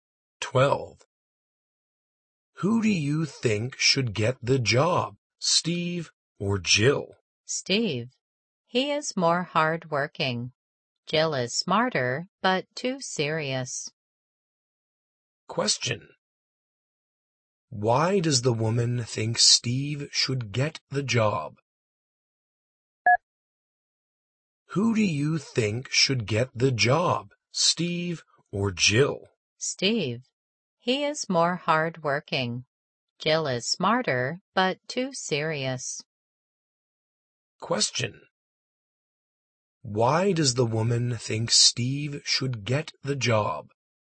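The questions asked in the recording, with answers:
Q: Why does the woman think Steve should get the job?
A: He is more hardworking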